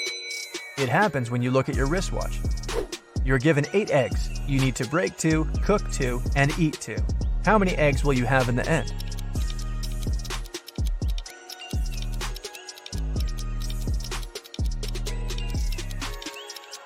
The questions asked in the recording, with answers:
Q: How many eggs will you have in the end?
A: It'll leave you with 6 eggs.